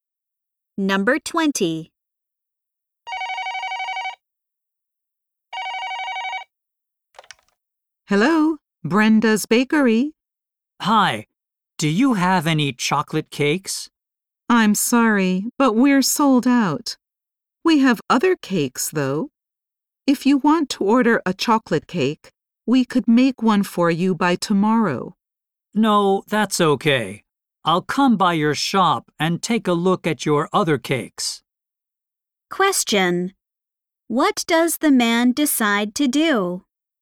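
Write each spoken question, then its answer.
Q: What does the man decide to do?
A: Go to the shop to look at the other cakes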